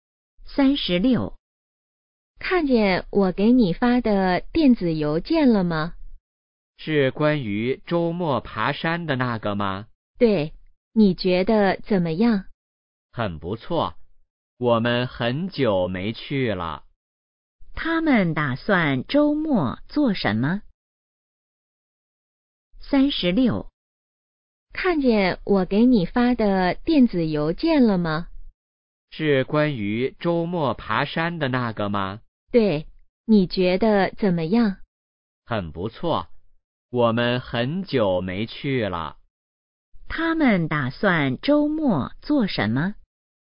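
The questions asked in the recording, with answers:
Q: 他们打算周末做什么?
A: 爬山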